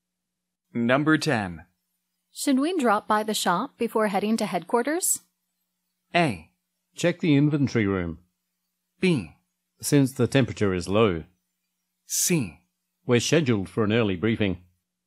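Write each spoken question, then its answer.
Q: Should we drop by the shop before heading to headquarters?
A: C: We're scheduled for an early briefing.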